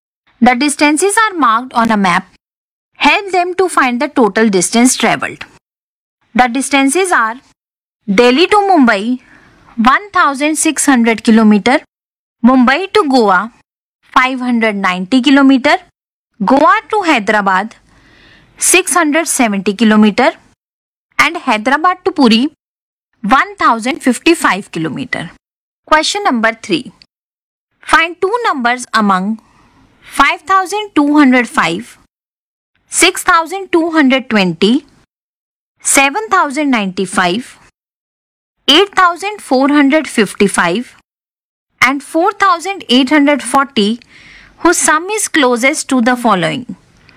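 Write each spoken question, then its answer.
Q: Help them to find the total distance travelled.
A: 3915 km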